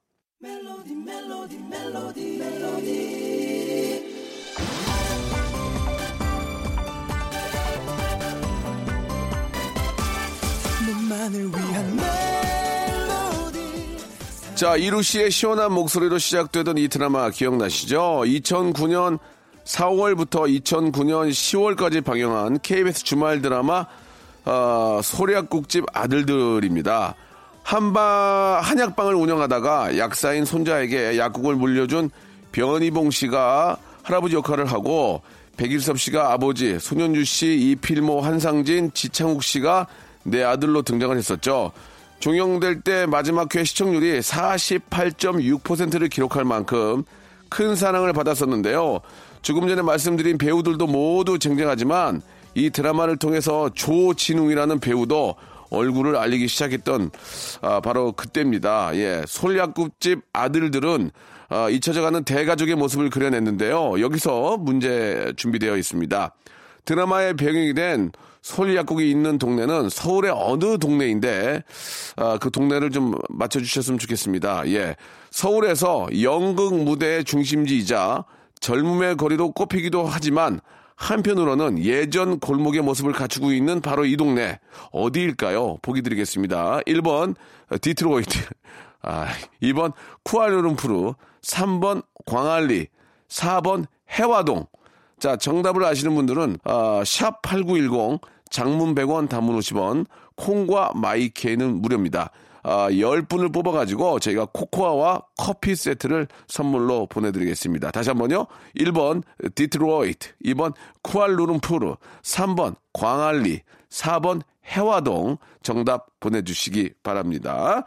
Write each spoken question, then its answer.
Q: 드라마의 배경이 된솔 약국이 있는 동네는 서울의 어느 동네인데 아, 그 동네를 좀 맞춰주셨으면 좋겠습니다.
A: 정답은 4번 해화동이었습니다.